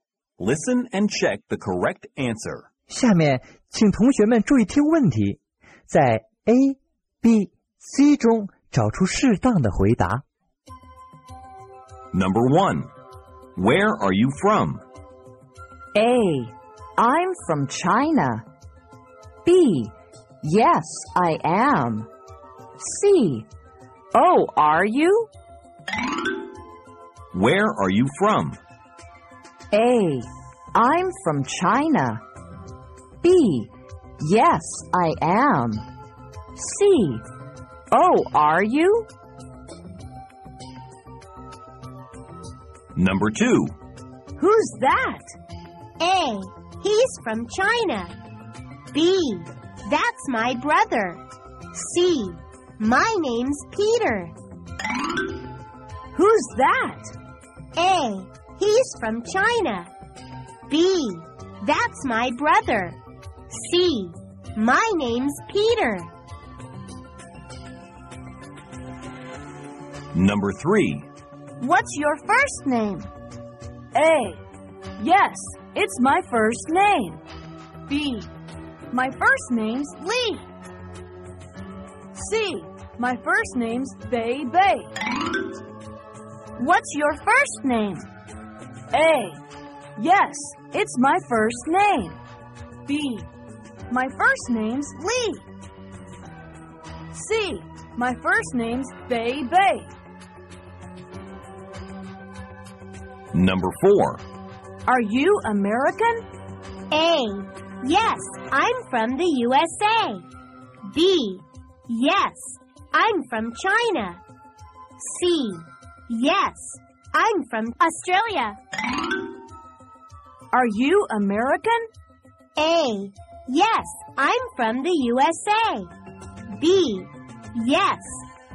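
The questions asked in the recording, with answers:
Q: where are you from?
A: A: I'm from China.

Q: Who's that?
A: B: That's my brother.

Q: Are you American?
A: A: Yes, I'm from the USA.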